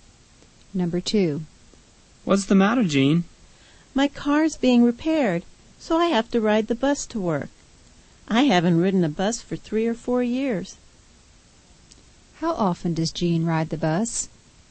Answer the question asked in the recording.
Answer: She scarcely rides the bus.